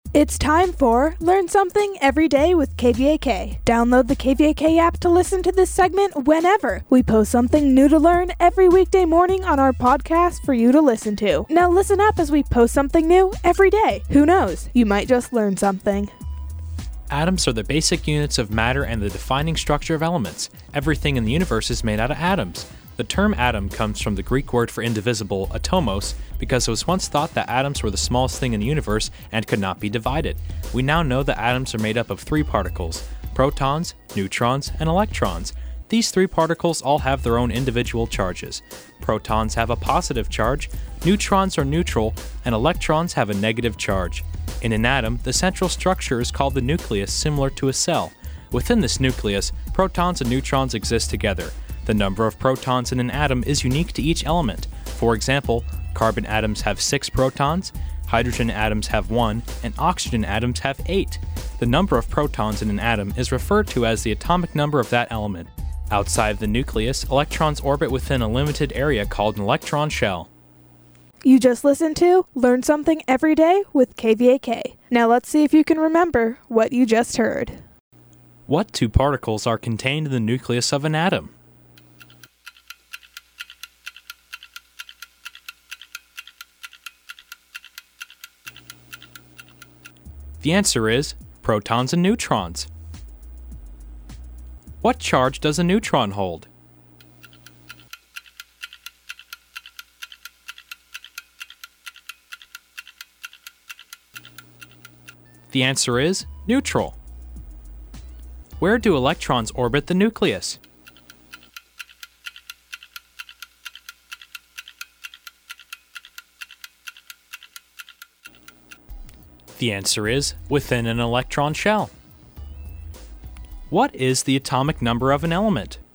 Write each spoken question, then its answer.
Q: What two particles are contained in the nucleus of an atom?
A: The answer is protons and neutrons.

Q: What charge does a neutron hold?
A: The answer is neutral.

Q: What is the atomic number of an element?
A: The answer is the atomic number is how many protons are in the atoms of that element.